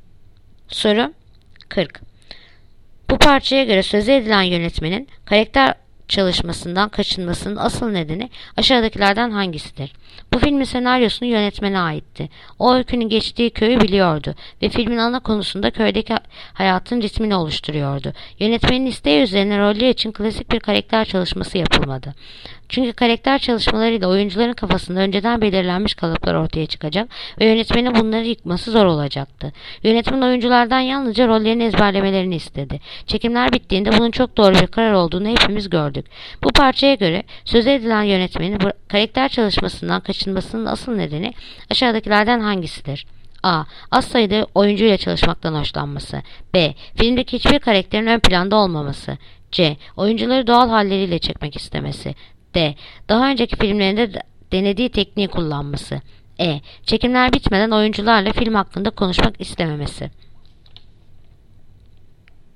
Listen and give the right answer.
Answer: Yanıt: Ceyhan. Oyuncuları doğal halleriyle çekmek istemesi.